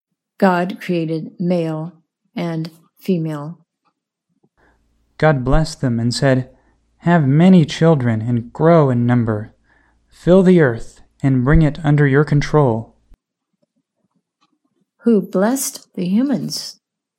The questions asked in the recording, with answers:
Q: Who blessed the humans?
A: God blessed the humans.